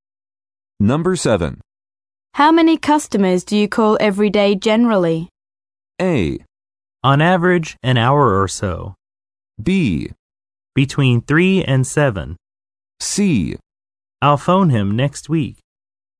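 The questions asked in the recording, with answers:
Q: How many customers do you call every day generally?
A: B: Between 3 and 7.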